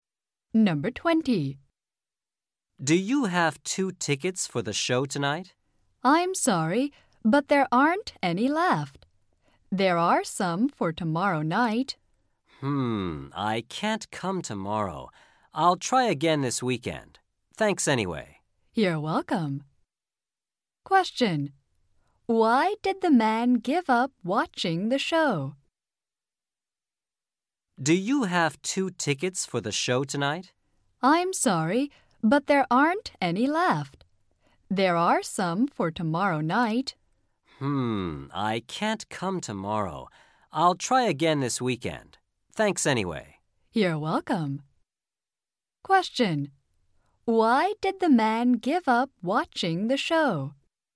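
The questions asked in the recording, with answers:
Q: Why did the man give up watching the show?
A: Because there were no tickets left for tonight and he can't come tomorrow.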